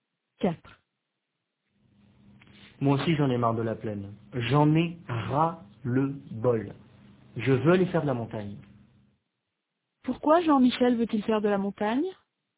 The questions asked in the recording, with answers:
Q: Pourquoi Jean-Michel veut-il faire de la montagne?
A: Parce qu'il en a marre de la plaine.